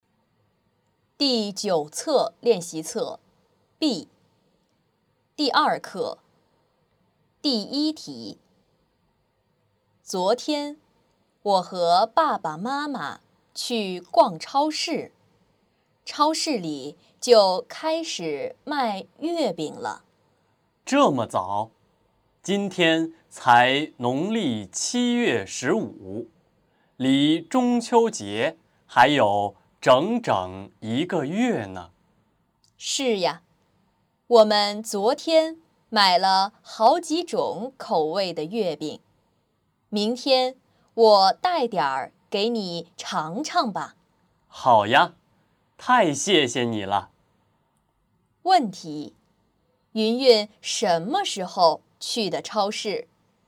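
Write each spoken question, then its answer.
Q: 云云什么时候去的超市?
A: 昨天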